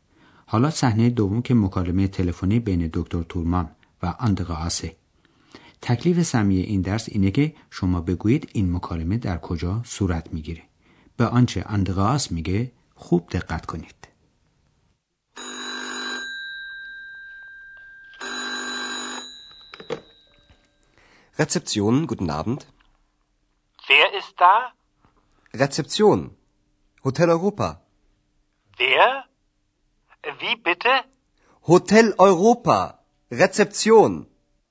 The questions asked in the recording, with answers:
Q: تکلیف سمی این درس اینه که شما بگویید این مکالمه در کجا صورت میگیره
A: اندراس گوشی رو برمیداره و میگه که اونجا رسپسیونه چون که اندراس در رسپسیون هتل اروپا کار میکنه